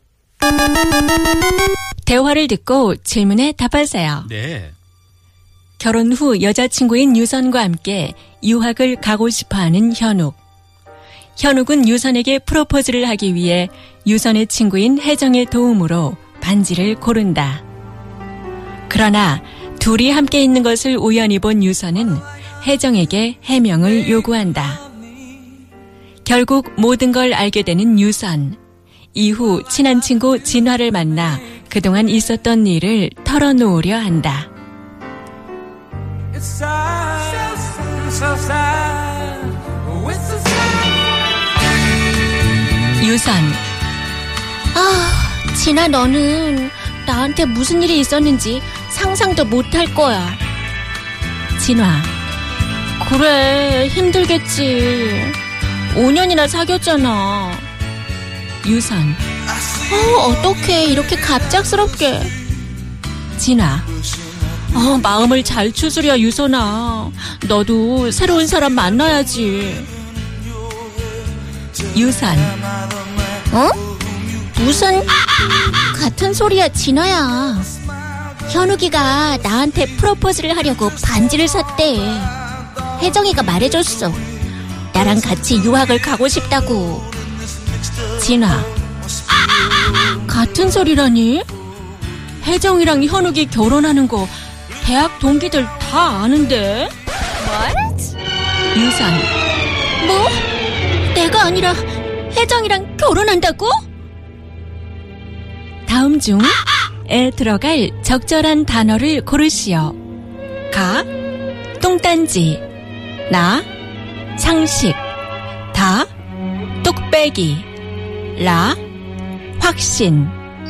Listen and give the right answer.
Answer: So the correct answer was 뚱딴치, something utterly absurd.